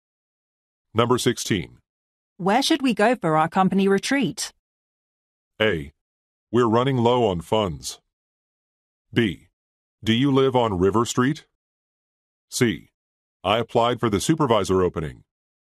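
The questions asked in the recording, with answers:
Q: Where should we go for our company retreat?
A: A: We're running low on funds.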